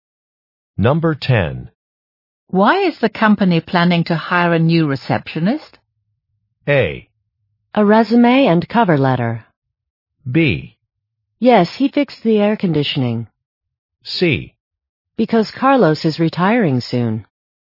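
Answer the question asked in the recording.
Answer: C: Because Carlos is retiring soon.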